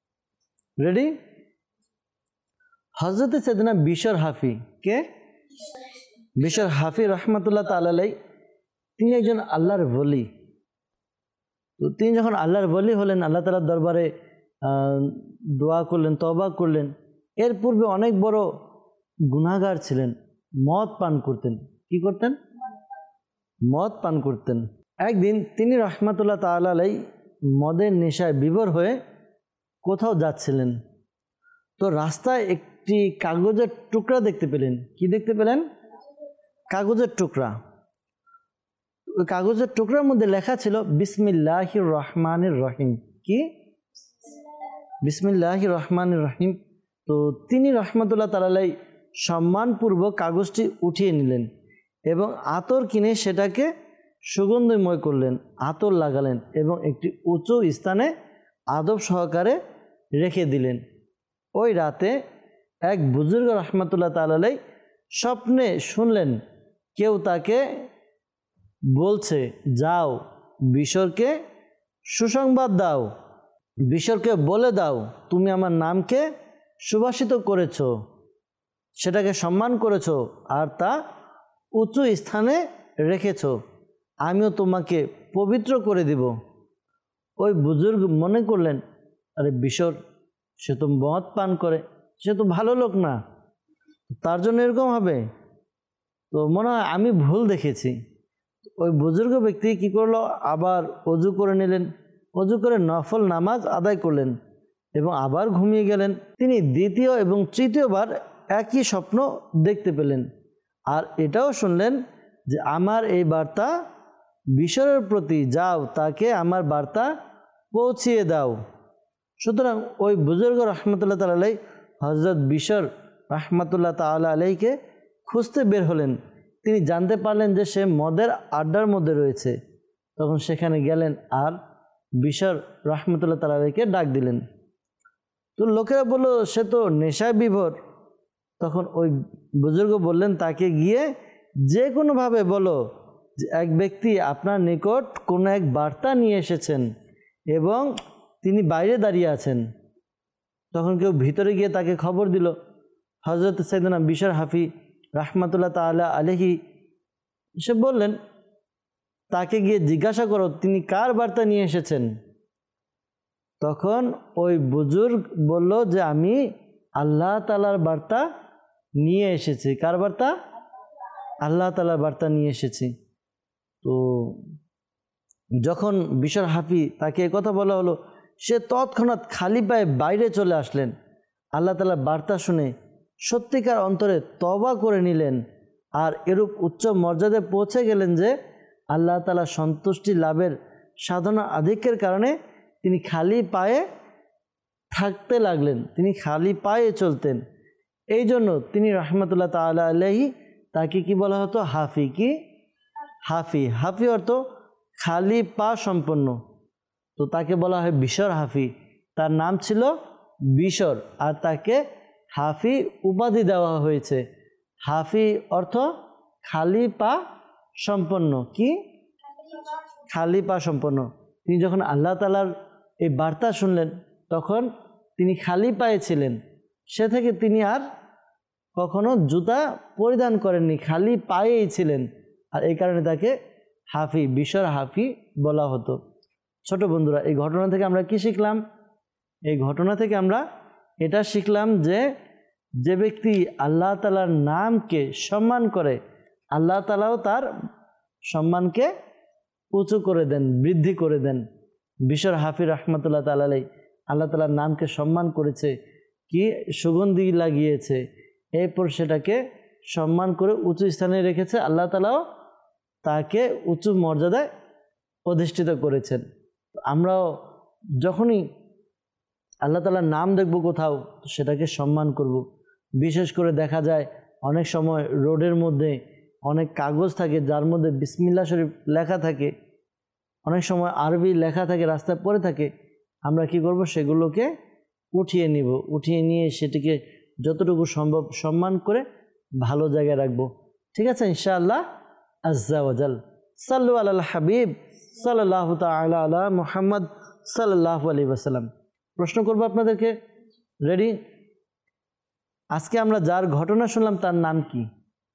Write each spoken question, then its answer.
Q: আজকে আমরা যার ঘটনা শুনলাম তার নাম কি?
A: হযরত সাইয়েদুনা বিশর হাফি।